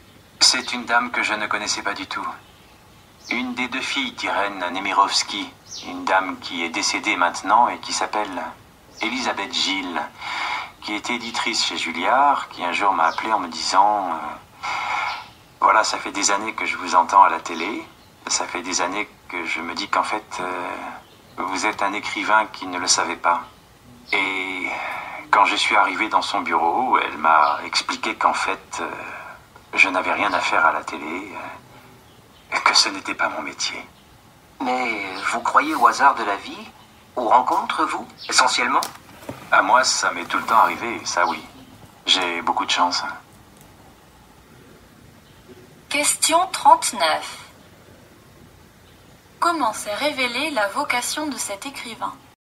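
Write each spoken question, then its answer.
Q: Comment s'est révélée la vocation de cet écrivain ?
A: Grâce à une éditrice, Elisabeth Gilles, qui l'a appelé pour lui dire qu'il était un écrivain qui s'ignorait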